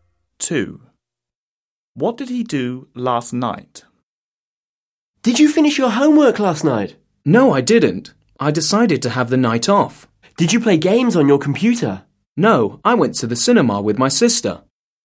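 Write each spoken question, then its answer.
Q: What did he do last night?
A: went to the cinema with his sister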